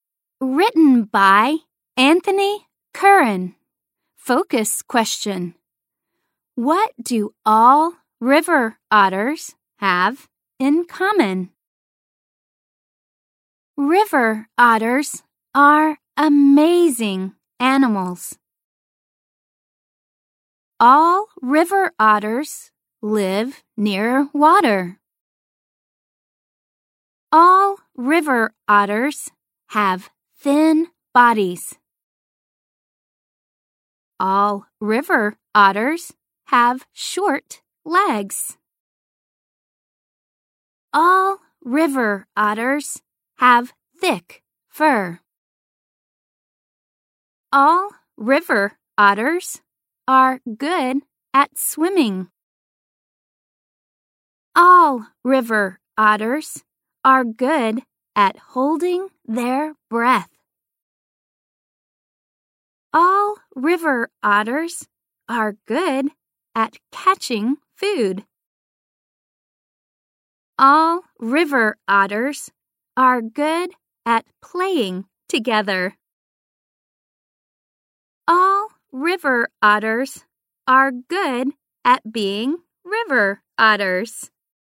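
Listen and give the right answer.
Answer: They all live near water, have thin bodies, short legs and thick fur, and are good at swimming, holding their breath, catching food and playing together.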